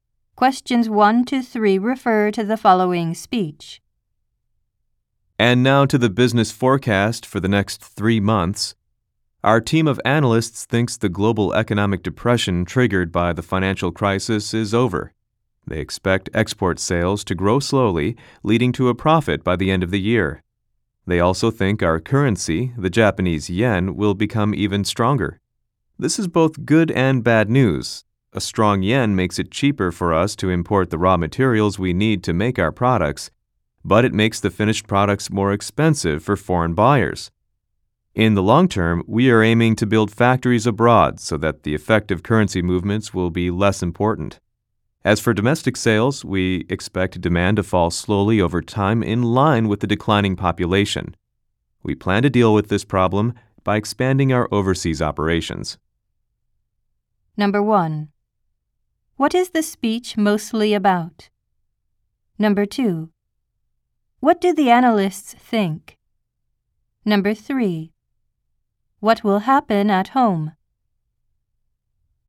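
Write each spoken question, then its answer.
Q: What is the speech mostly about?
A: The company's business forecast for the next 3 months

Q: What will happen at home?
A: Domestic demand will fall slowly because the population is declining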